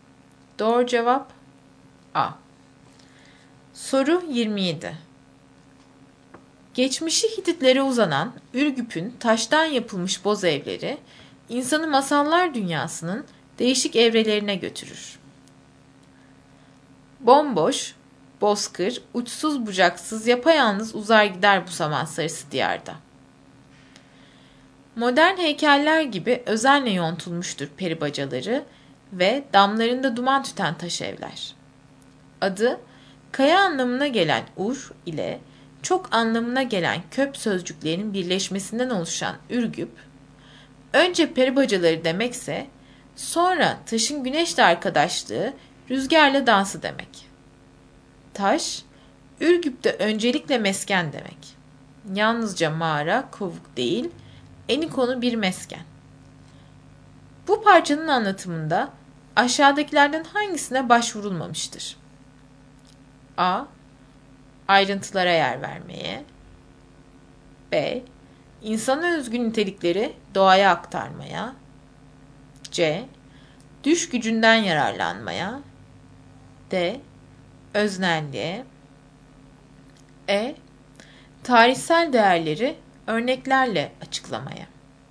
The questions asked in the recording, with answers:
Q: Bu parçanın anlatımında aşağıdakilerden hangisine başvurulmamıştır?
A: Doğru cevap E.